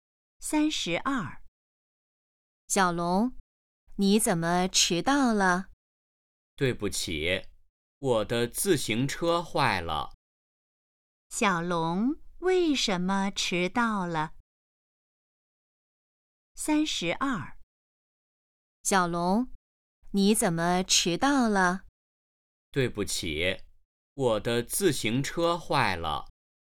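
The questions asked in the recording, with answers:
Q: 小龙为什么迟到了?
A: 他的自行车坏了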